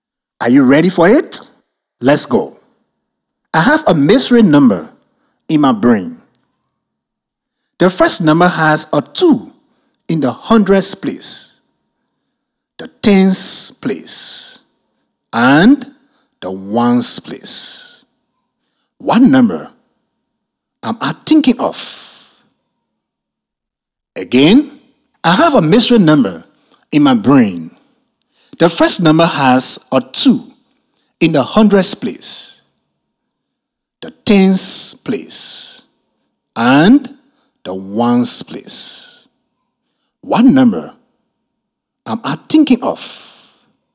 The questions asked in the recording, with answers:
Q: One number I'm thinking of.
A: So the number is 222.